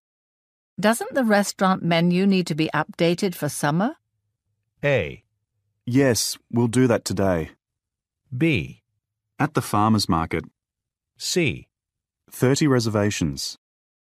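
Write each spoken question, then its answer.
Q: Doesn't the restaurant menu need to be updated for summer?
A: A: Yes, we'll do that today.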